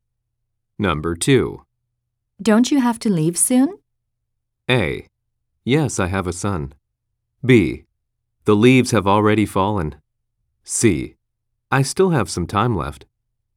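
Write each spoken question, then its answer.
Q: Don't you have to leave soon?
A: C: I still have some time left.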